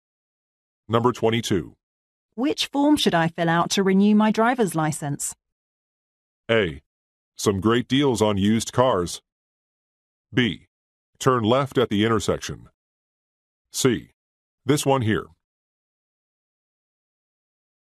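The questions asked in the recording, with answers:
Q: Which form should I fill out to renew my driver's license?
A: C: This one here.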